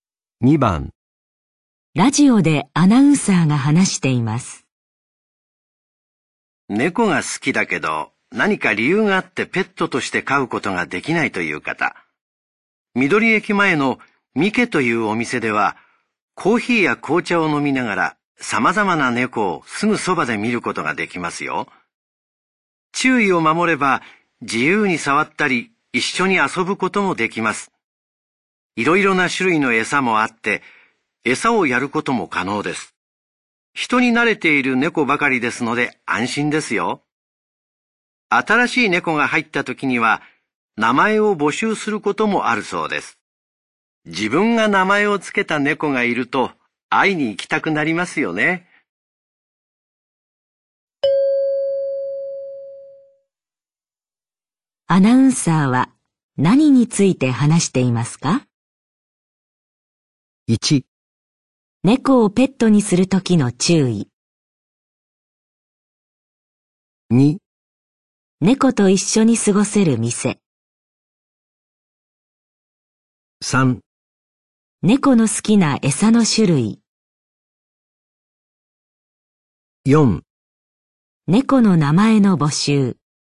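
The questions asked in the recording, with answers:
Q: アナウンサーは何について話していますか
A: 2: 猫と一緒に過ごせる店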